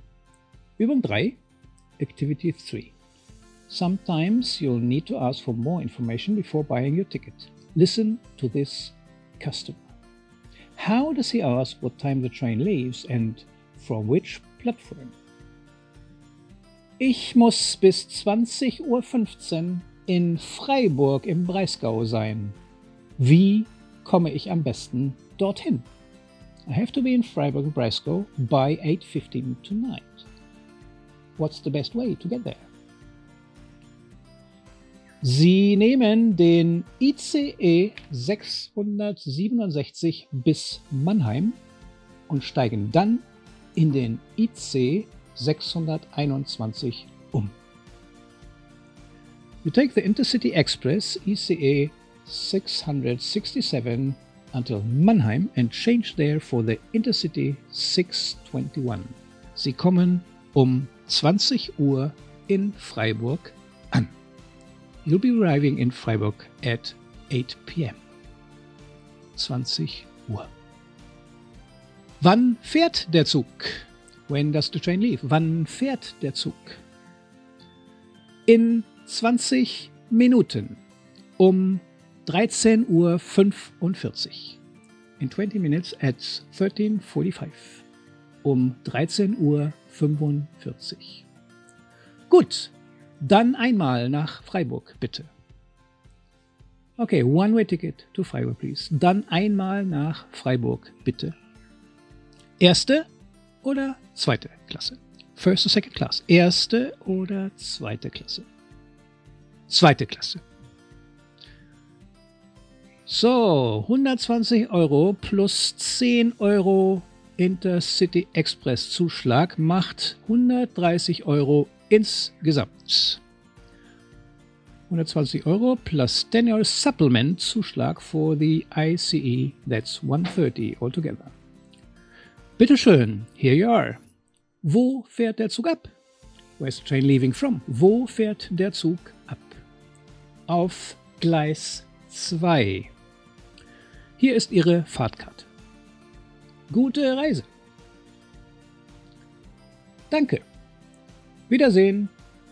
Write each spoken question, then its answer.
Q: How does he ask what time the train leaves and from which platform?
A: To ask when the train is leaving, he said, wann fährt der Zug?